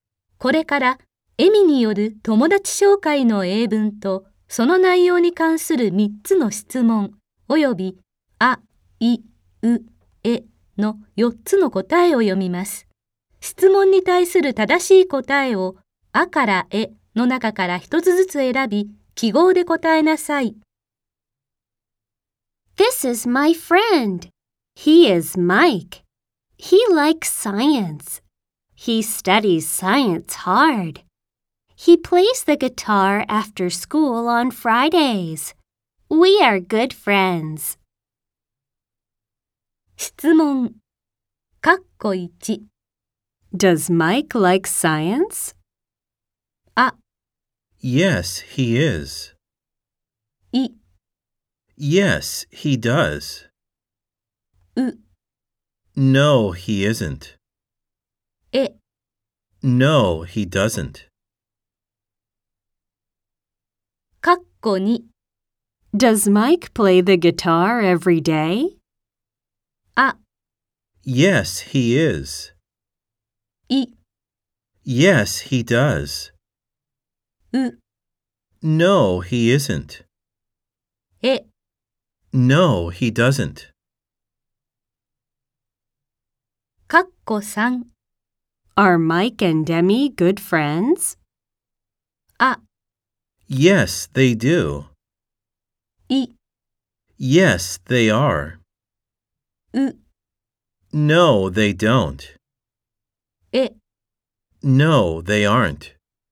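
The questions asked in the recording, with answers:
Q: Does Mike like science?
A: い: Yes, he does.

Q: Does Mike play the guitar every day?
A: え: No, he doesn't.

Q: Are Mike and Demi good friends?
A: い: Yes, they are.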